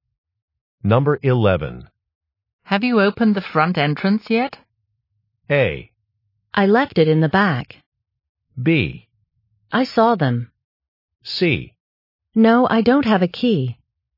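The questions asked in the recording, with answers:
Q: Have you opened the front entrance yet?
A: C: No, I don't have a key.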